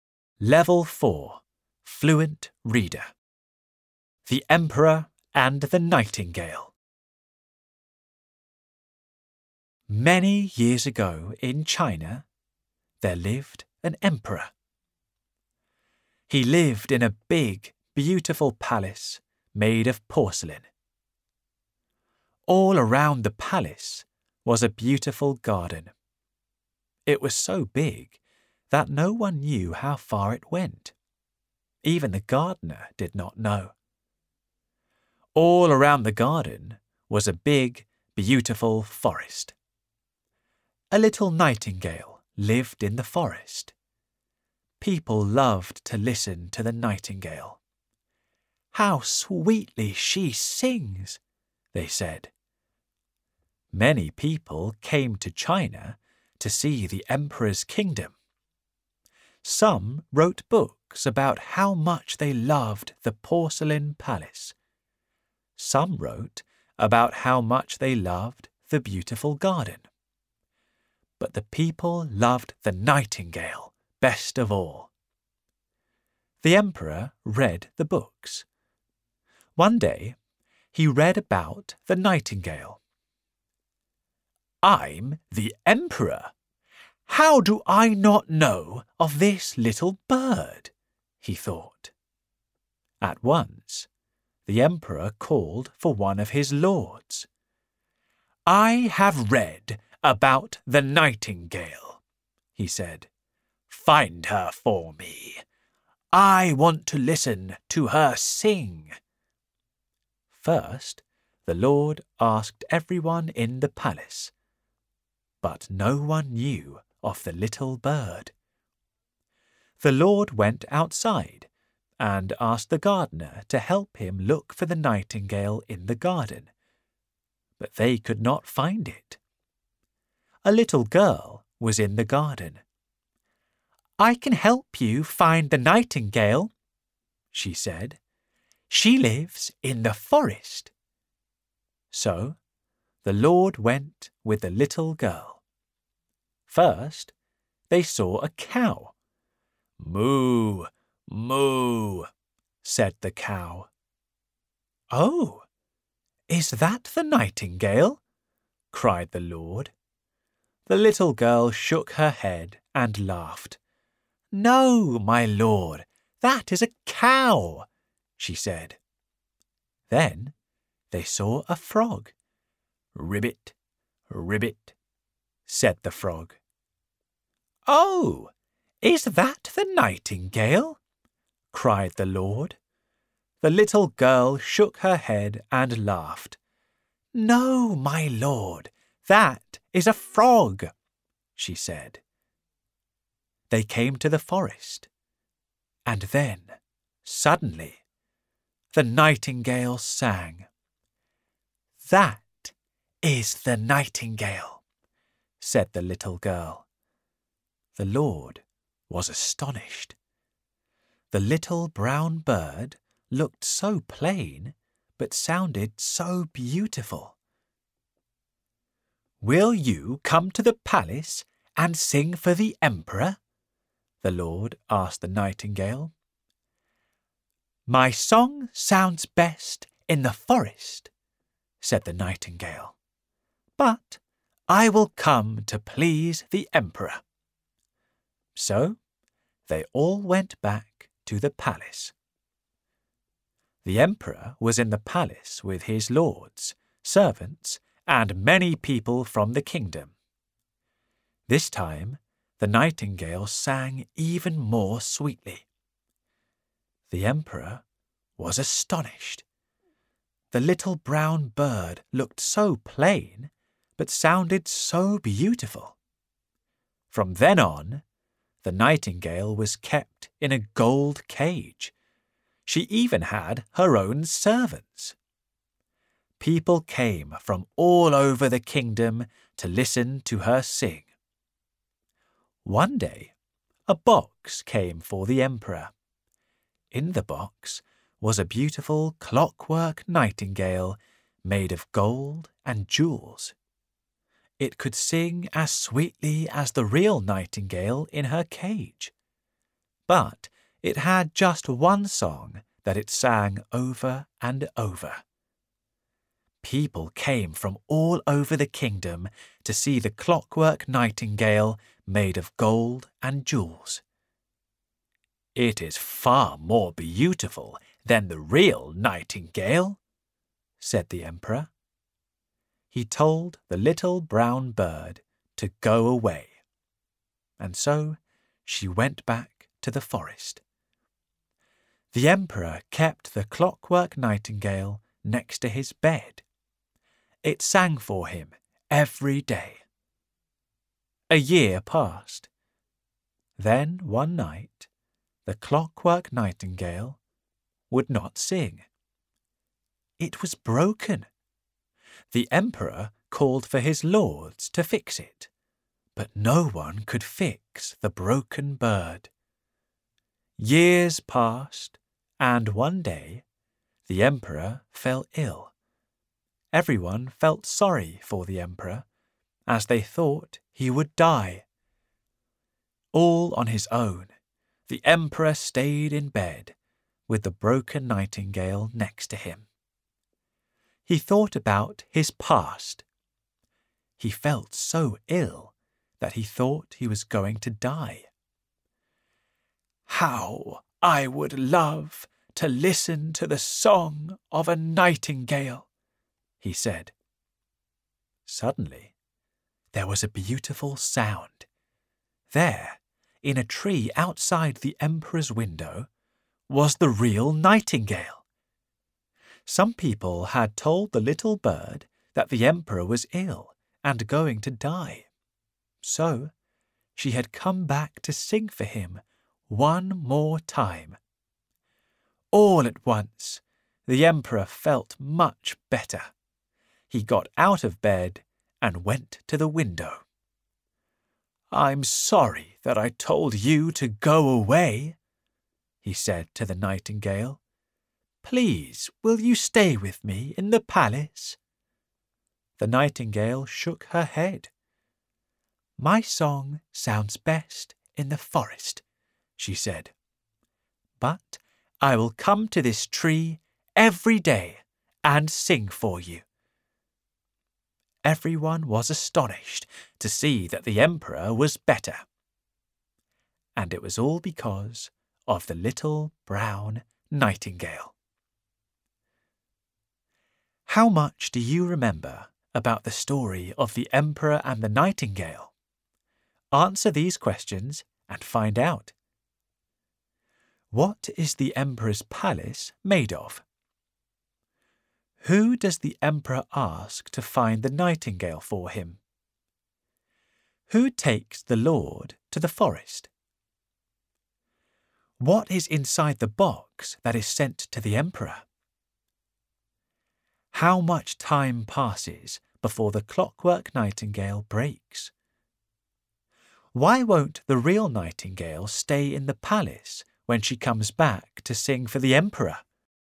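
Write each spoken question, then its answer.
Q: What is the emperor's palace made of?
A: Porcelain

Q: Who does the emperor ask to find the nightingale for him?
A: One of his lords

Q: Who takes the lord to the forest?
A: A little girl

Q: What is inside the box that is sent to the emperor?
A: A clockwork nightingale made of gold and jewels

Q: How much time passes before the clockwork nightingale breaks?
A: A year

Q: Why won't the real nightingale stay in the palace when she comes back to sing for the emperor?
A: Her song sounds best in the forest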